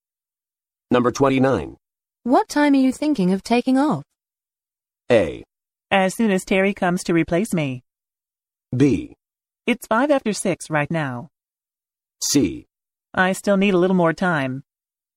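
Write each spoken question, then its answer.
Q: What time are you thinking of taking off?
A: A: As soon as Terry comes to replace me.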